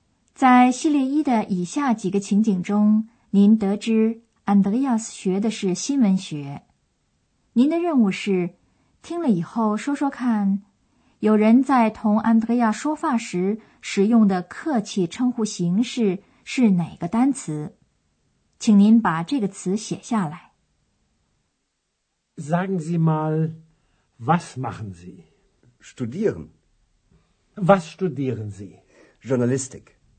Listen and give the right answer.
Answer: 首先找的是客气的称呼形式,它是 Z, 您。